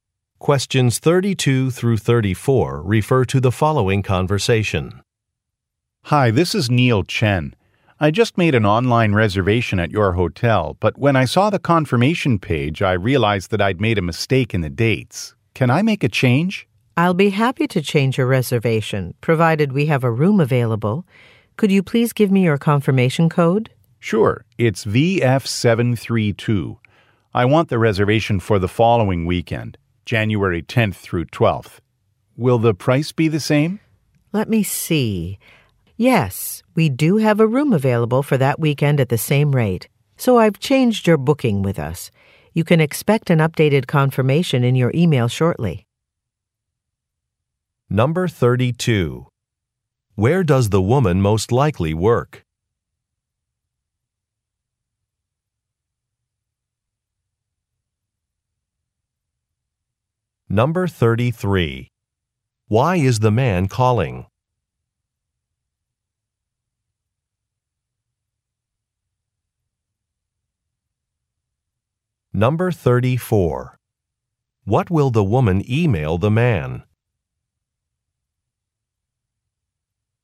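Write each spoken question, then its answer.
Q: Where does the woman most likely work?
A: At a hotel

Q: Why is the man calling?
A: To change the dates of his reservation

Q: What will the woman email the man?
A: An updated confirmation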